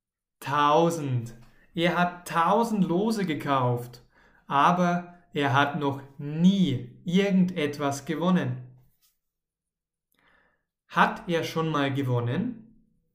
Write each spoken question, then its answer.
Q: Hat er schon mal gewonnen?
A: Nein, noch nie. Er hat noch nie irgendetwas gewonnen.